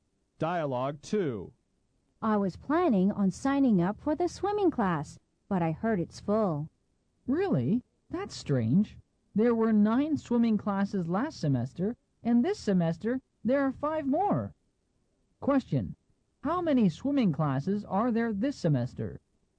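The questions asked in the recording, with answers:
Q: How many swimming classes are there this semester?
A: 14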